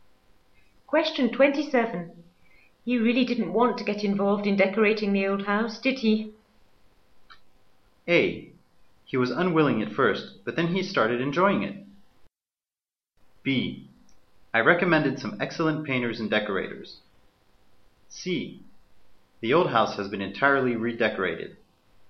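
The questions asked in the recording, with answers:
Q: You really didn't want to get involved in decorating the old house, did he?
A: A: He was unwilling at first, but then he started enjoying it.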